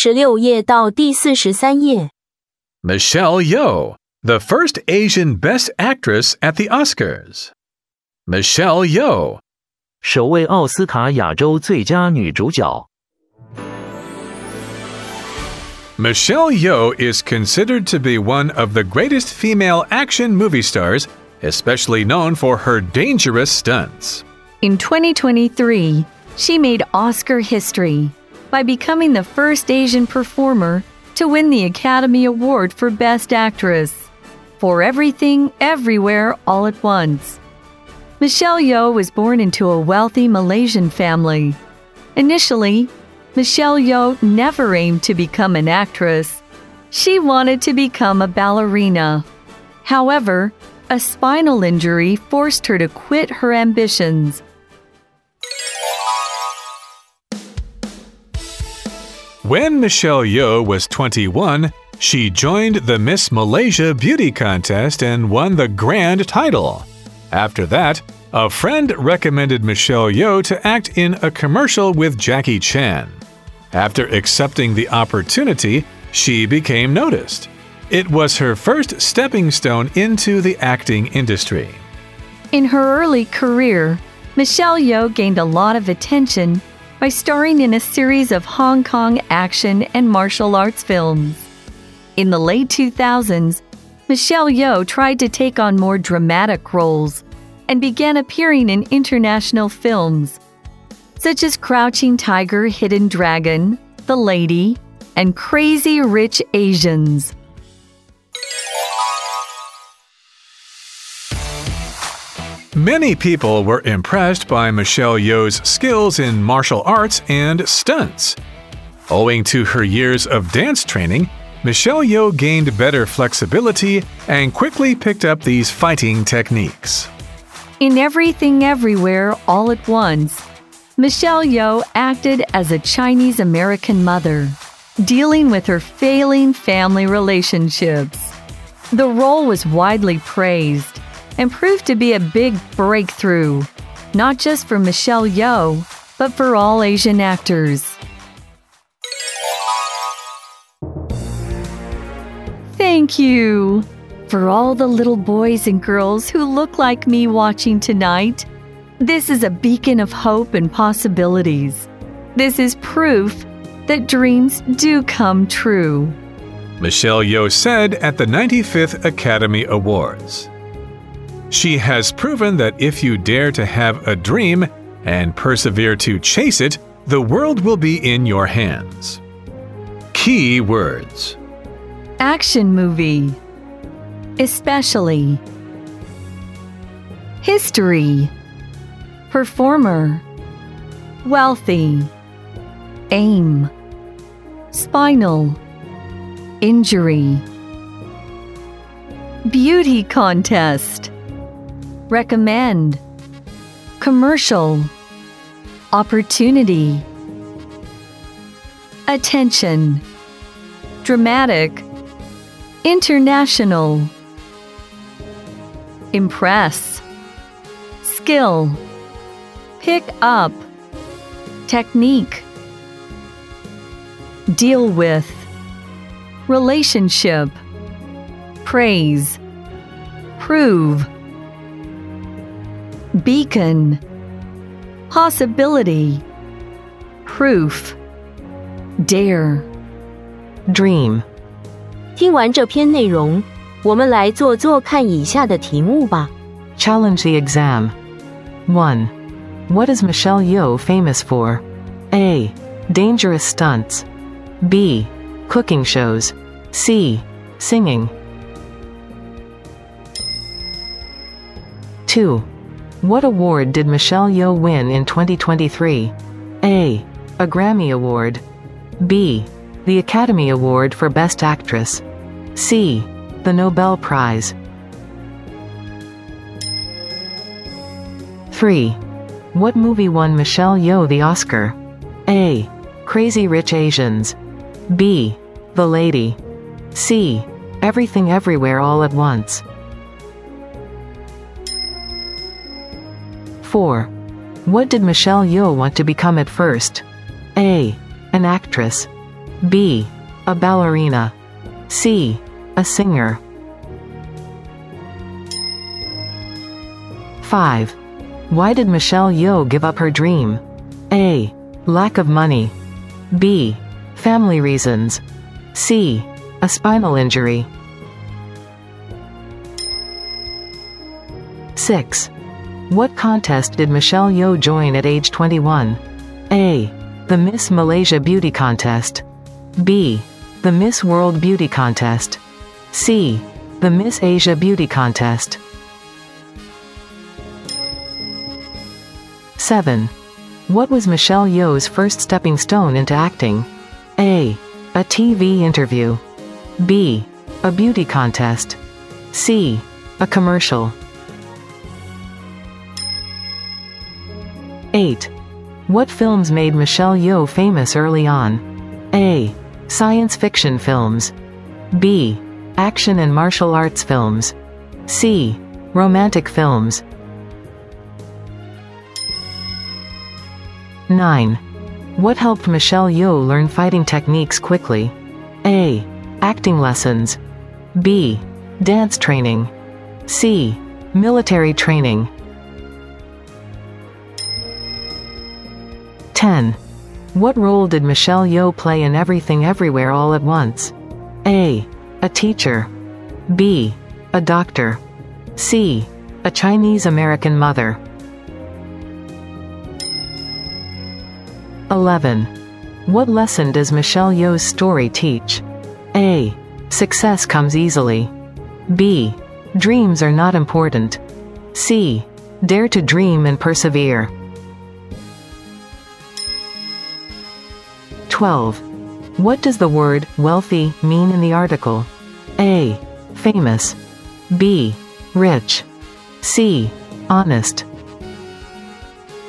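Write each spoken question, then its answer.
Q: What is Michelle Yeoh famous for?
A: A: Dangerous stunts.

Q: What award did Michelle Yeoh win in 2023?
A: B: The Academy Award for Best Actress.

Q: What movie won Michelle Yeoh the Oscar?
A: C: Everything Everywhere All at Once.

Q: What did Michelle Yeoh want to become at first?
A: B: A ballerina.

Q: Why did Michelle Yeoh give up her dream?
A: C: A spinal injury.

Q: What contest did Michelle Yeoh join at age 21?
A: A: The Miss Malaysia Beauty Contest.

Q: What was Michelle Yeoh's first stepping stone into acting?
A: C: A commercial.

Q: What films made Michelle Yeoh famous early on?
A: B: Action and martial arts films.

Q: What helped Michelle Yeoh learn fighting techniques quickly?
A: B: Dance training.

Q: What role did Michelle Yeoh play in Everything Everywhere All at Once?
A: C: A Chinese-American mother.

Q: What lesson does Michelle Yeoh's story teach?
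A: C: Dare to dream and persevere.

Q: What does the word wealthy mean in the article?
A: B: Rich.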